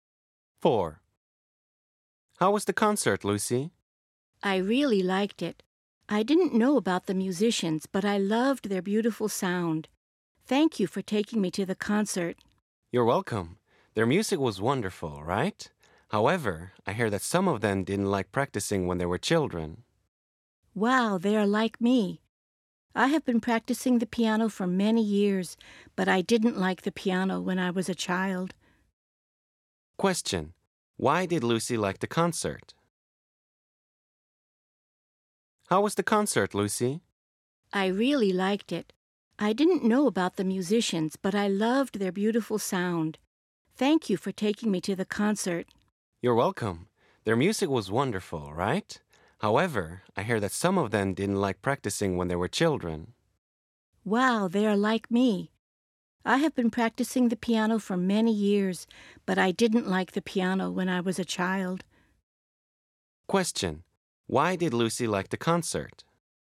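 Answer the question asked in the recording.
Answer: Because she loved the musicians' beautiful sound.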